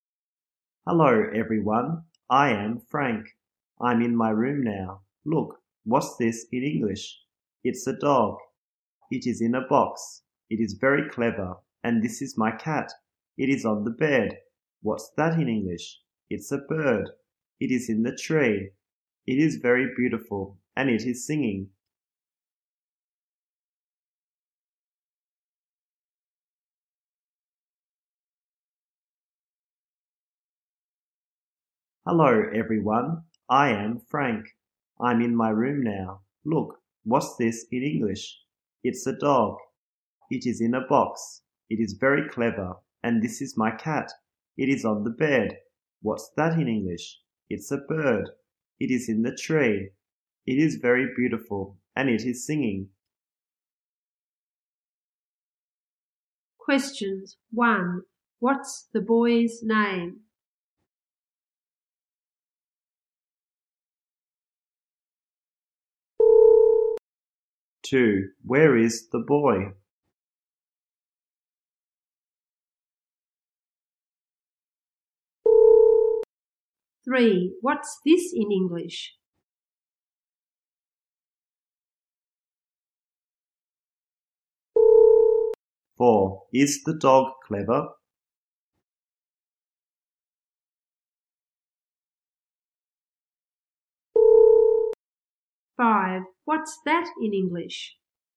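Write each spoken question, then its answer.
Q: What's the boy's name?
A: Frank

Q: Where is the boy?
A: In his room

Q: What's this in English?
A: A dog

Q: Is the dog clever?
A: Yes, it is.

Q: What's that in English?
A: A bird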